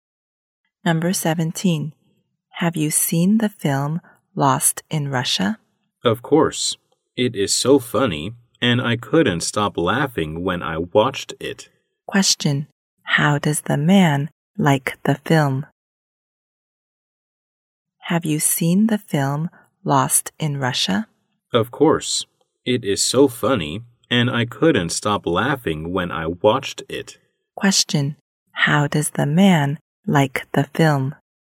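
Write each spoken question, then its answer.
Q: How does the man like the film?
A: It is very funny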